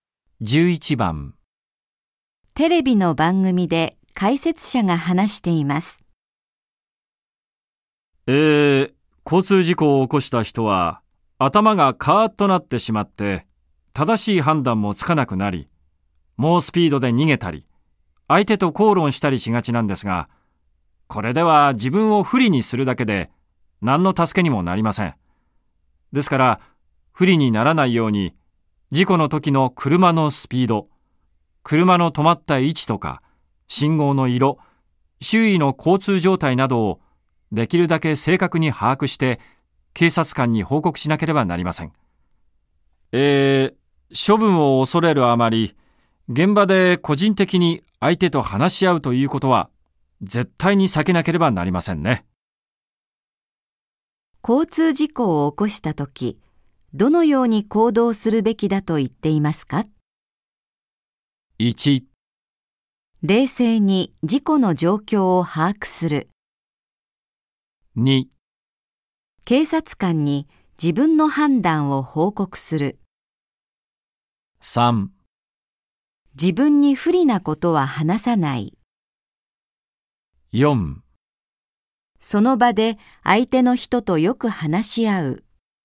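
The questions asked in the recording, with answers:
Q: 交通事故を起こした時、どのように行動するべきだと言っていますか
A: 1: 冷静に事故の状況を把握する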